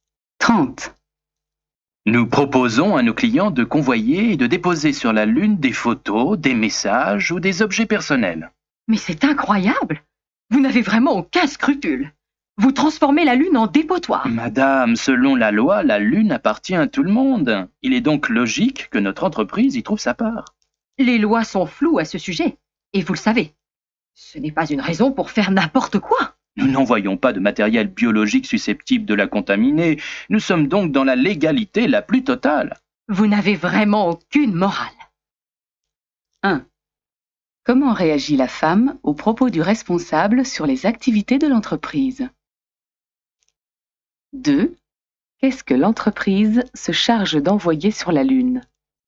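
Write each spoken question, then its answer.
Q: Comment réagit la femme aux propos du responsable sur les activités de l'entreprise?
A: Elle est indignée : elle l'accuse de n'avoir aucun scrupule ni aucune morale.

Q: Qu'est-ce que l'entreprise se charge d'envoyer sur la Lune?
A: Des photos, des messages ou des objets personnels de ses clients.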